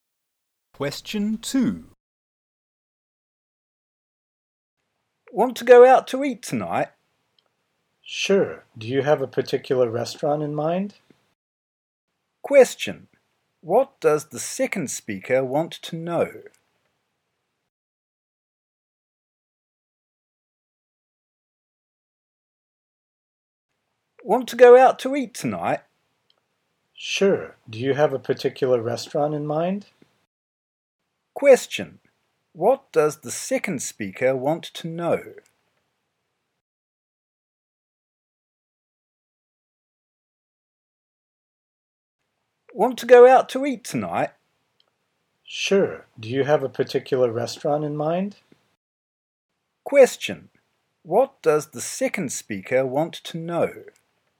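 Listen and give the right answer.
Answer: Which restaurant the first speaker has in mind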